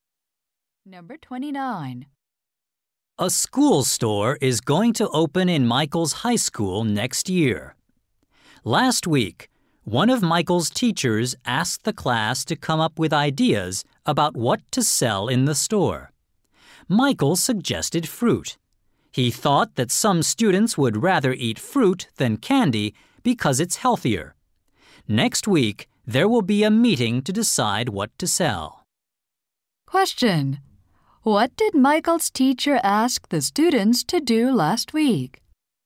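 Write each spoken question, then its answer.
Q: What did Michael's teacher ask the students to do last week?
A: Suggest ideas for what to sell in the school store.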